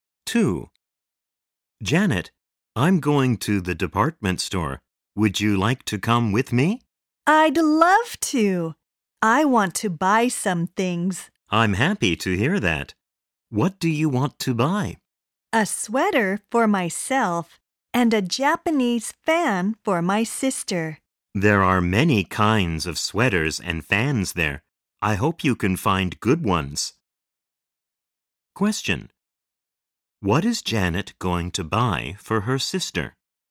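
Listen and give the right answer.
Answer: A Japanese fan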